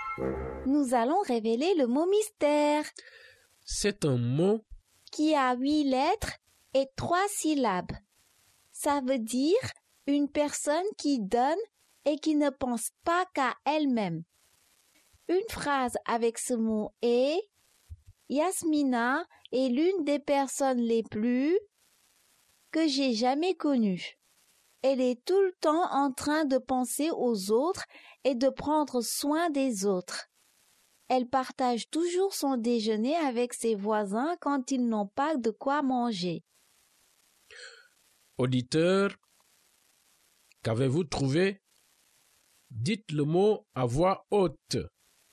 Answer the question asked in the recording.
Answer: Le mot mystère est généreux.